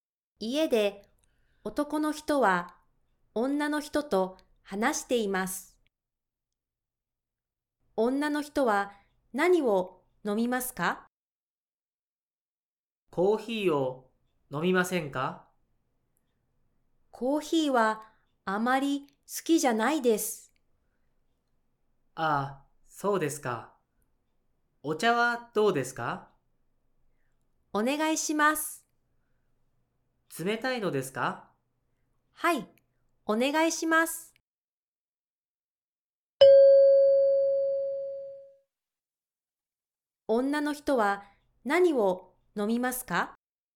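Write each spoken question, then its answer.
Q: 女の人は何を飲みますか?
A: 冷たいお茶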